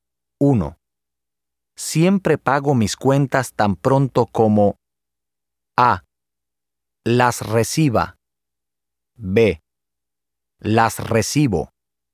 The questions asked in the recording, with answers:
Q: Siempre pago mis cuentas tan pronto como A. Las reciba. B. Las recibo.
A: B. Siempre pago mis cuentas tan pronto como las recibo.